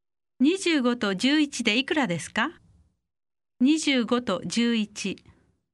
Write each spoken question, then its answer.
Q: 25と11でいくらですか25と11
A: 36